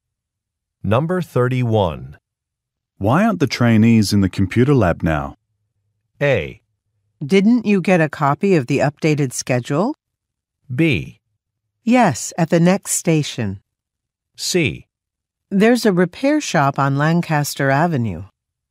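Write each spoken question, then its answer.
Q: Why aren't the trainees in the computer lab now?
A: A: Didn't you get a copy of the updated schedule?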